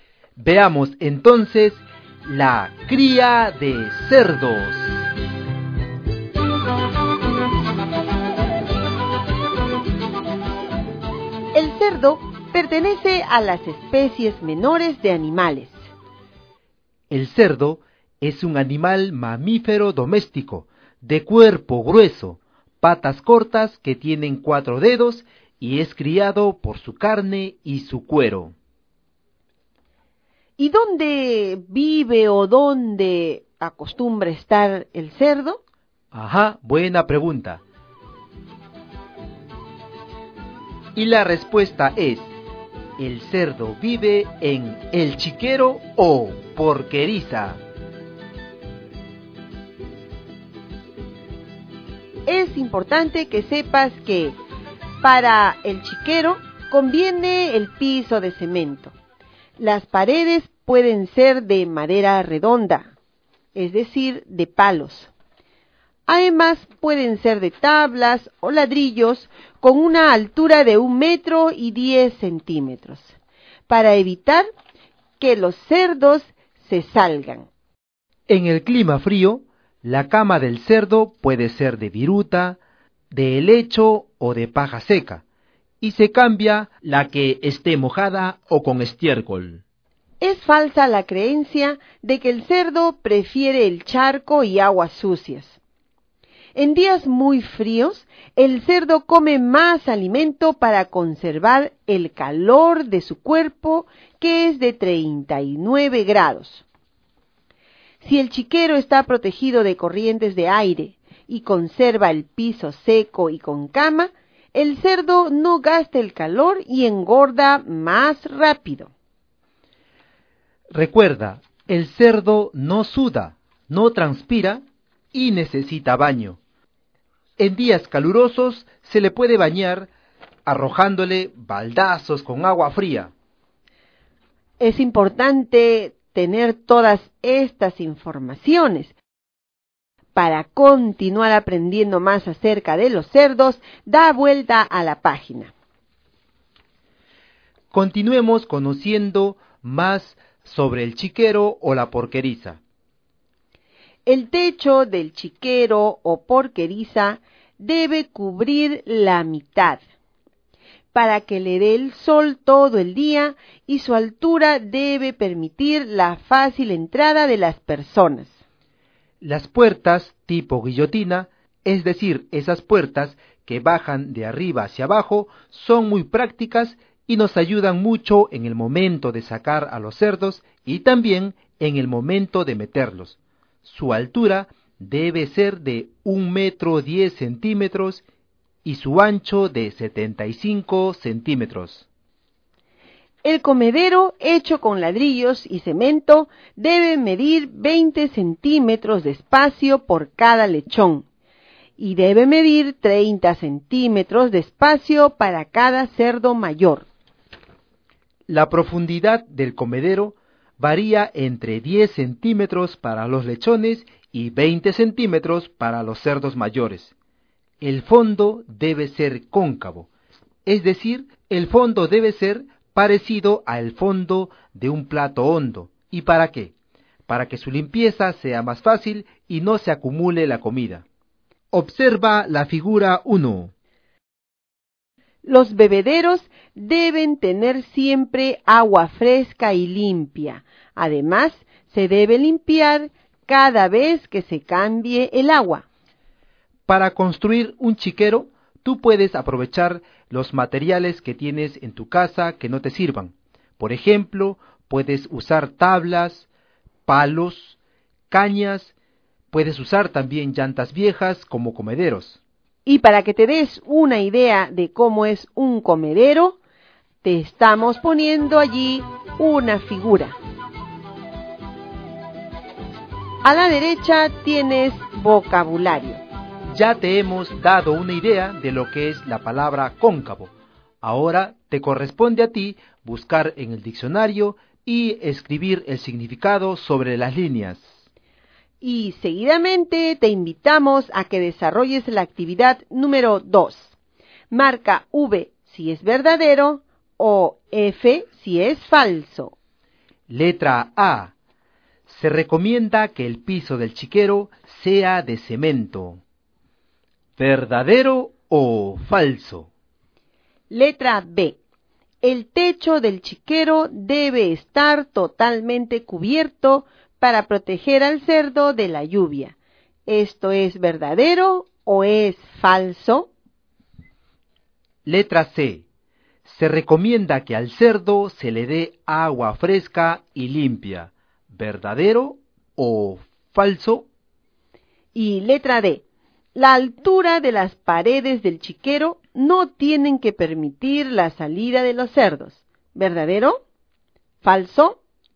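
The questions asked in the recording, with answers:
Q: Letra A. Se recomienda que el piso del chiquero sea de cemento. ¿Verdadero o falso?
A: Verdadero

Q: Letra B. El techo del chiquero debe estar totalmente cubierto para proteger al cerdo de la lluvia. ¿Esto es verdadero o es falso?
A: Falso

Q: Letra C. Se recomienda que al cerdo se le dé agua fresca y limpia. ¿Verdadero o falso?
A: Verdadero

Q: Y letra D. La altura de las paredes del chiquero no tienen que permitir la salida de los cerdos. ¿Verdadero? ¿Falso?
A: Verdadero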